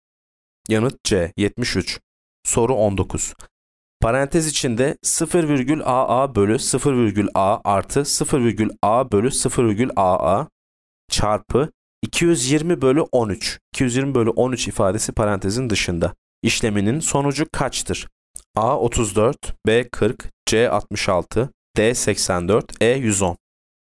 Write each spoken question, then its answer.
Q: İşleminin sonucu kaçtır?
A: Yanıt A 34.